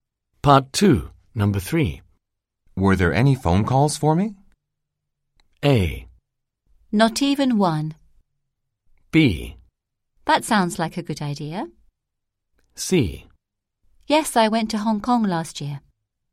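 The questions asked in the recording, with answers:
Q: Were there any phone calls for me?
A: A: Not even one.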